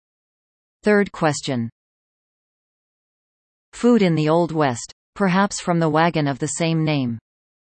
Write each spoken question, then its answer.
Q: Food in the Old West, perhaps from the wagon of the same name.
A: The answer? Chuck.